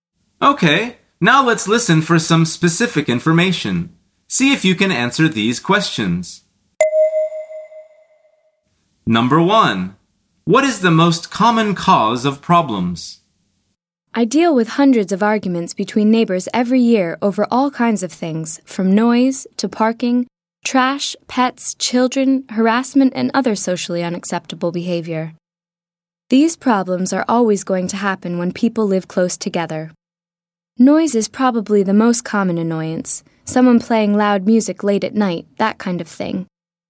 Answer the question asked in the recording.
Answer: The answer is noise.